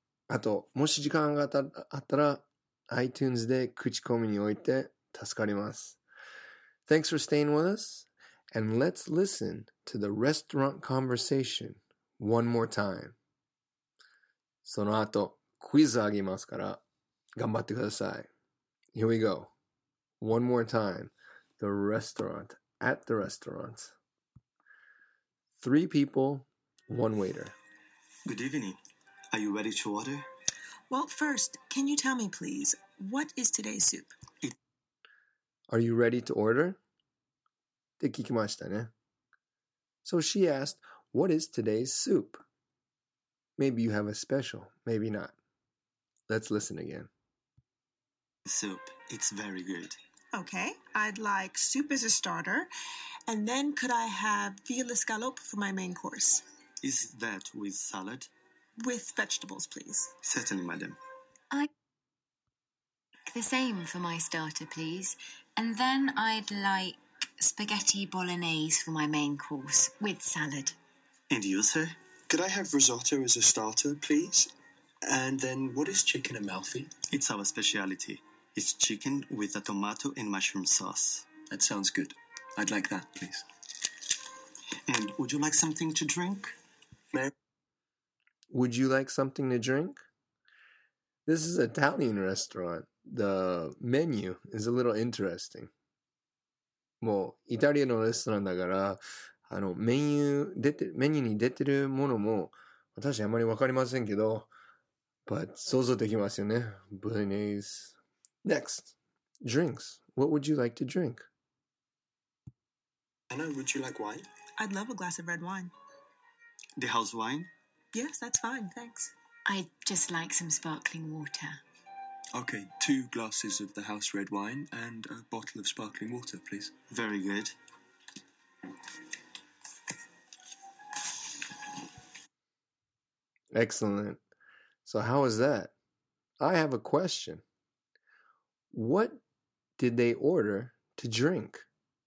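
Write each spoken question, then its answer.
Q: What did they order to drink?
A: Two glasses of the house red wine and a bottle of sparkling water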